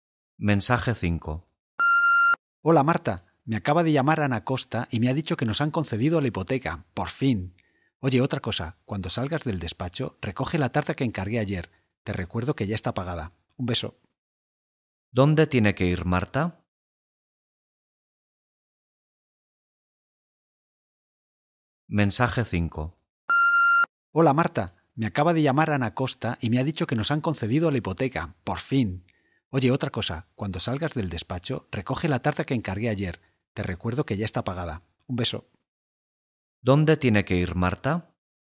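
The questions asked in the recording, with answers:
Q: ¿Dónde tiene que ir Marta?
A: A recoger la tarta encargada (a la pastelería)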